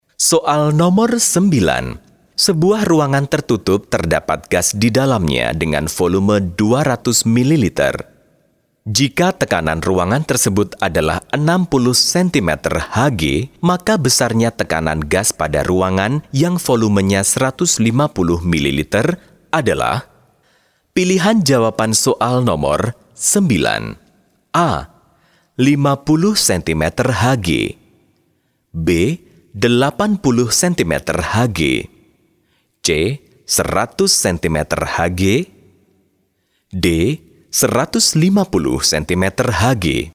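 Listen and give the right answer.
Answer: B: 80 cm Hg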